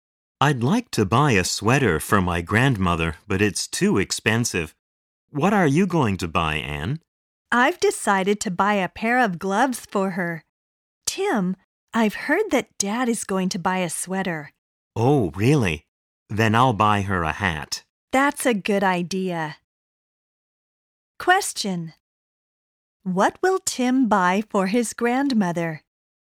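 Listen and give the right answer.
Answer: A hat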